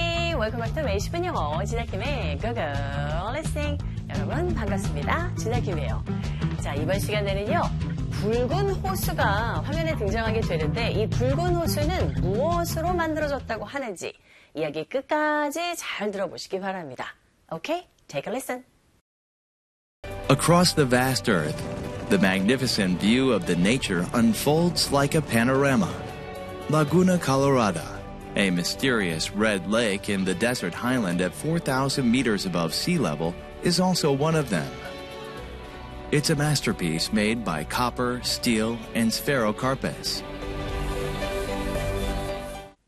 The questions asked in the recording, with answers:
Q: 이 붉은 호수는 무엇으로 만들어졌다고 하는지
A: 바로 이 붉은 호수는요, 구리와 철과 이끼리로 만들어졌다고 합니다.